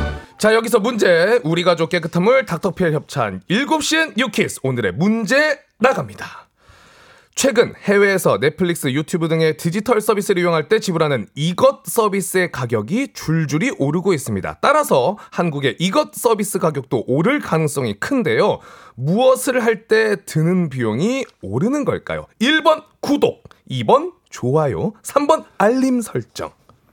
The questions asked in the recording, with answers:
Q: 무엇을 할 때 드는 비용이 오르는 걸까요? 1번 구독, 2번 좋아요, 3번 알림 설정.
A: 정답은 바로 1번 구독입니다.